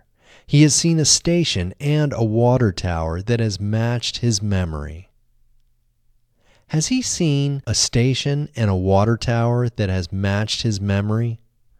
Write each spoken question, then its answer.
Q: Has he seen a station and a water tower that has matched his memory?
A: Yes, he has seen a station and a water tower that has matched his memory.